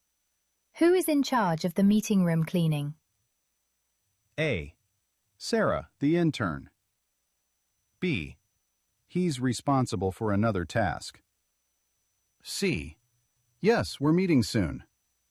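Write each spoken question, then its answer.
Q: Who is in charge of the meeting room cleaning?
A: A: Sarah, the intern.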